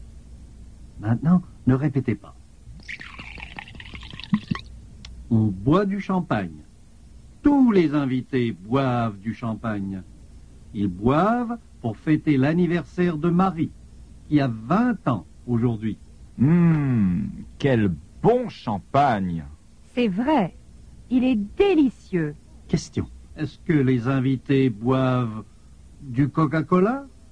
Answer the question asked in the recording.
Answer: Non, ils ne boivent pas de Coca-Cola.